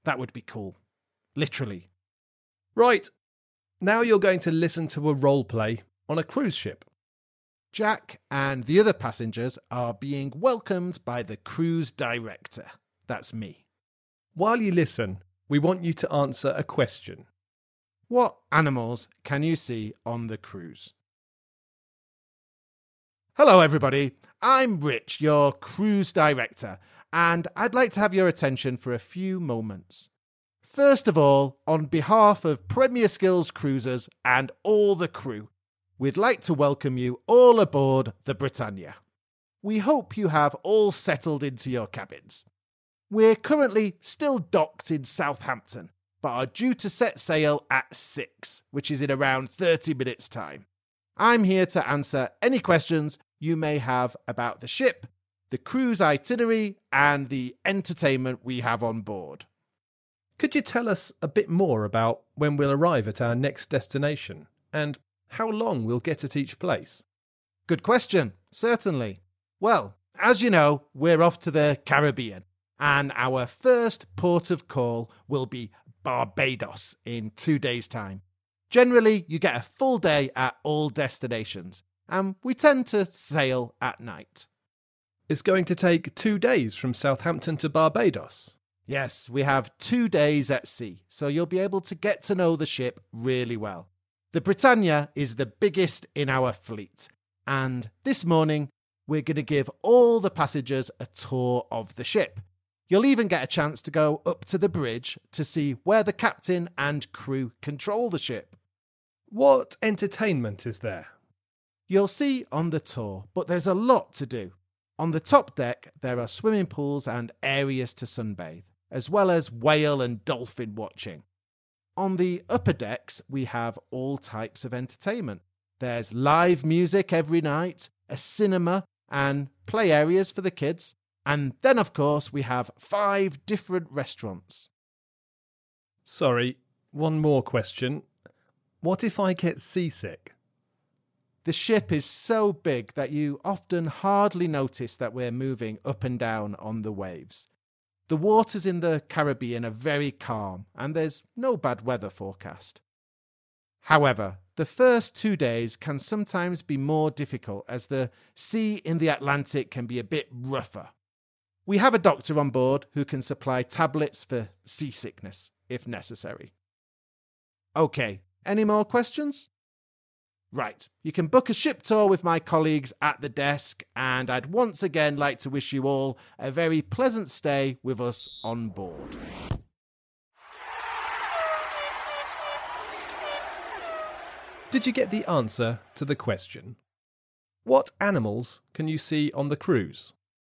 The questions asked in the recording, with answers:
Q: What animals can you see on the cruise?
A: The answer is dolphins and whales.